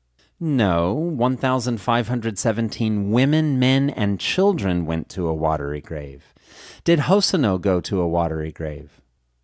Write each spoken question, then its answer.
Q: Did Hosono go to a watery grave?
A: No, Hosono didn't go to a watery grave.